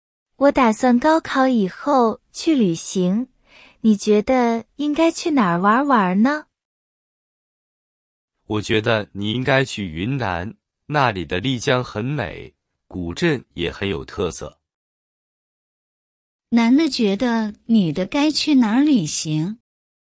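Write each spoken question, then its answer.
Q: 男的觉得女的该去哪儿旅行?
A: 云南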